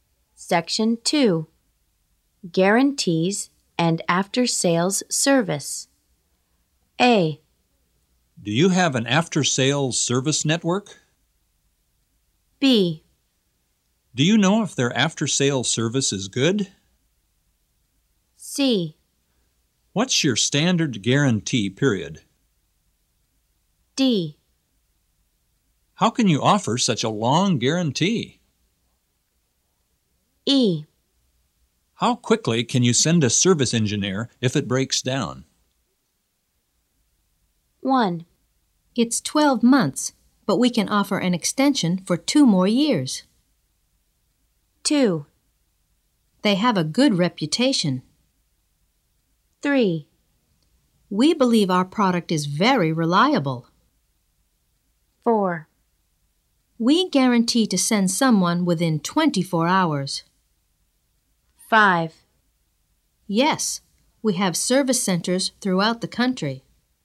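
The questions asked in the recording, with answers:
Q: It's 12 months, but we can offer an extension for 2 more years.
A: C: What's your standard guarantee period?

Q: They have a good reputation.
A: B: Do you know if their after-sales service is good?

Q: We believe our product is very reliable.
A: D: How can you offer such a long guarantee?

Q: We guarantee to send someone within 24 hours.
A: E: How quickly can you send a service engineer if it breaks down?

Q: Yes, we have service centers throughout the country.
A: A: Do you have an after-sales service network?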